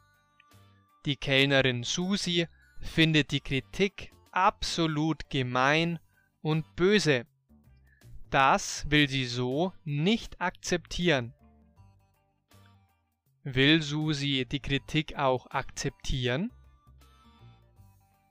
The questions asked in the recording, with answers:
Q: Will Susi die Kritik auch akzeptieren?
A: Nein, das will sie nicht.